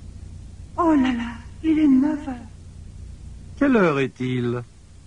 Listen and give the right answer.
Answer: Il est 9 heures.